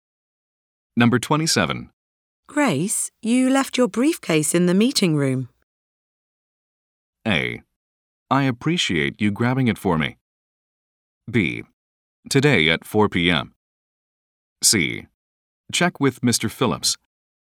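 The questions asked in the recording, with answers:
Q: Grace, you left your briefcase in the meeting room.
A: A: I appreciate you grabbing it for me.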